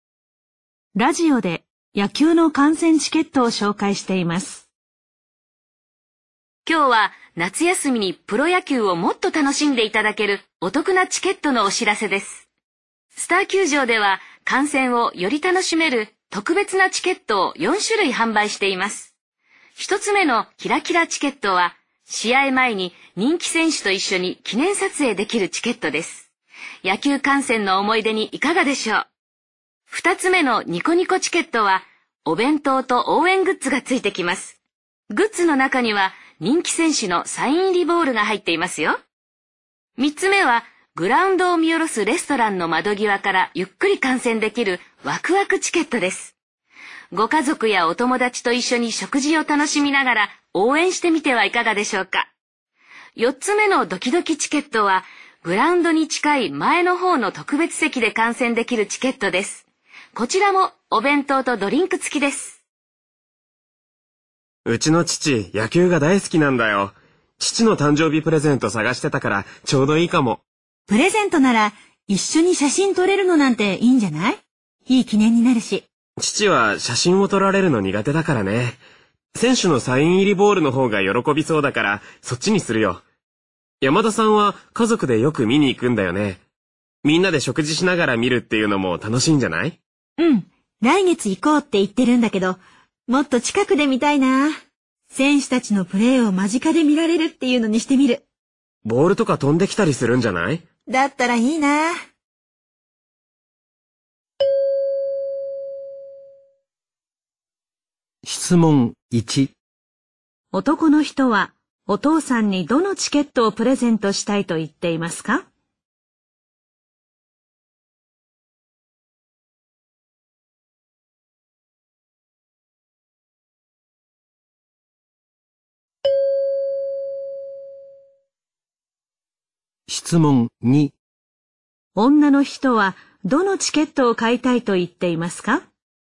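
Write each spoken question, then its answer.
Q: 男の人はお父さんにどのチケットをプレゼントしたいと言っていますか?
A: ニコニコチケット

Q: 女の人はどのチケットを買いたいと言っていますか?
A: ドキドキチケット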